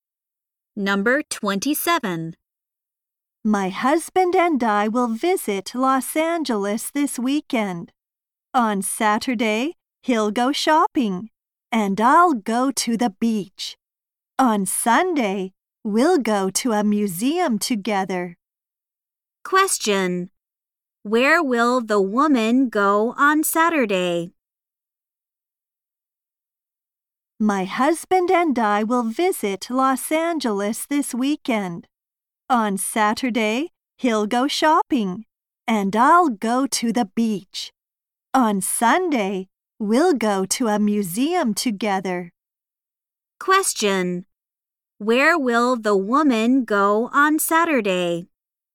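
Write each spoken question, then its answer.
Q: Where will the woman go on Saturday?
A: To the beach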